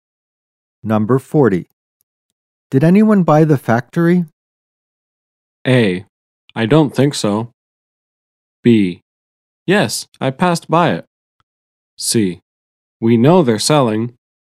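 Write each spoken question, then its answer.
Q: Did anyone buy the factory?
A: A: I don't think so.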